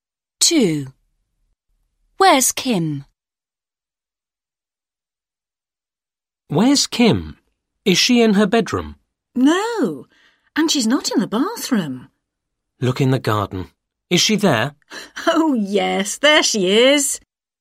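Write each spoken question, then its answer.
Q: Where's Kim?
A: in the garden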